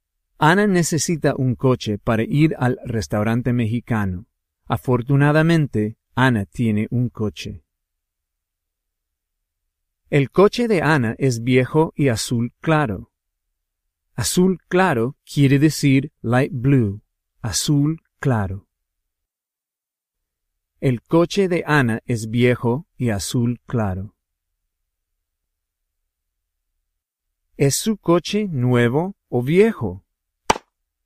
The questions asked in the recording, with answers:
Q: ¿Es su coche nuevo o viejo?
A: Su coche es viejo.